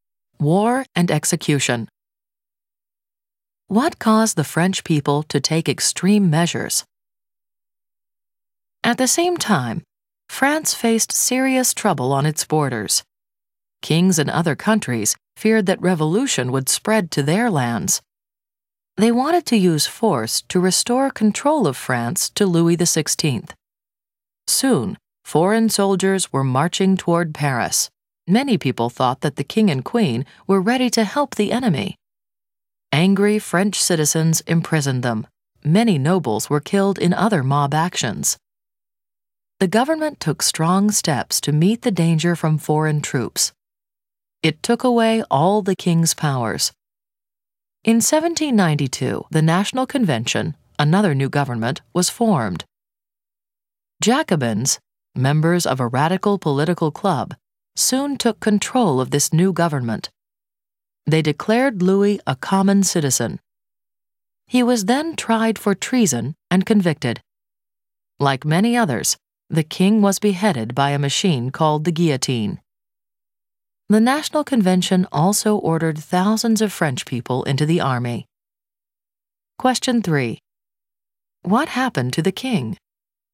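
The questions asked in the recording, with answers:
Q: What happened to the king?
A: He was tried for treason, convicted, and beheaded by the guillotine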